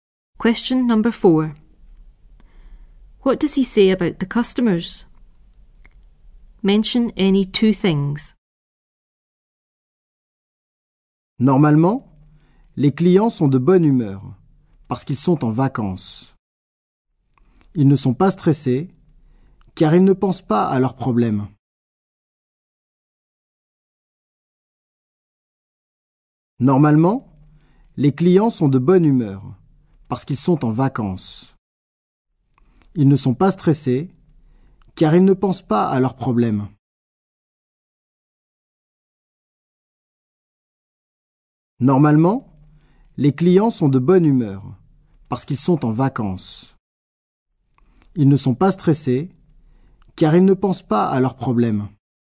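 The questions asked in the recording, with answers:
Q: What does he say about the customers?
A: They are in a good mood because on holiday; not stressed, not thinking of their problems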